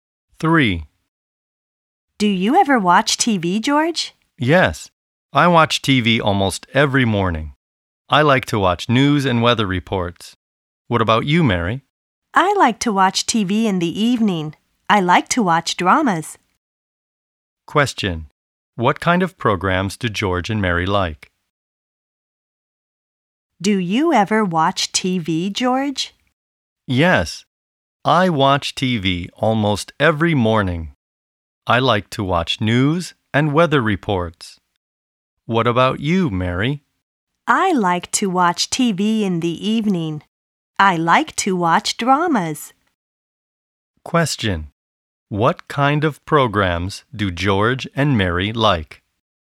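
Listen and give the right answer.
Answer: George likes news and weather reports; Mary likes dramas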